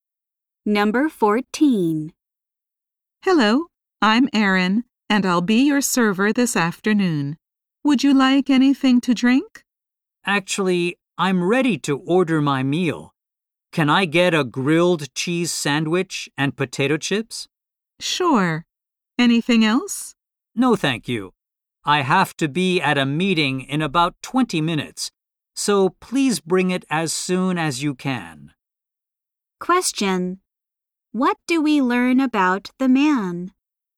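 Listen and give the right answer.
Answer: He has a meeting in about 20 minutes, so he is in a hurry.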